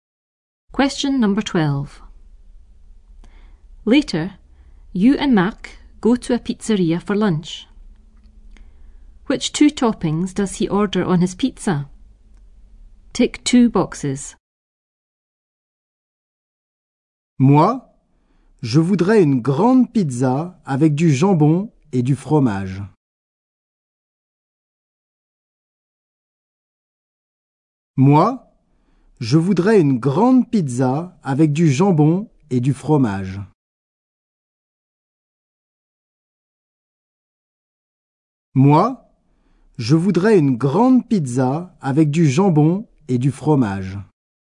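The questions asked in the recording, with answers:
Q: Which two toppings does he order on his pizza?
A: Ham and cheese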